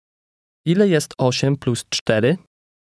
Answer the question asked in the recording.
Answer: 12.